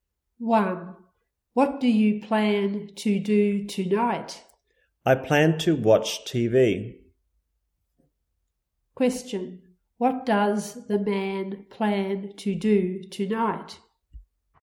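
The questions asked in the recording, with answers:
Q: What does the man plan to do tonight?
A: Watch TV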